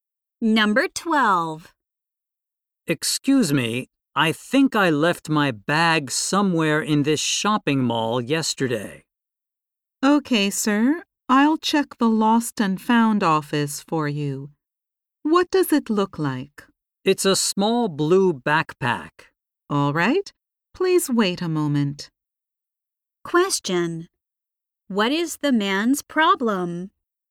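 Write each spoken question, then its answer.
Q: What is the man's problem?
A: He left his bag somewhere in the shopping mall.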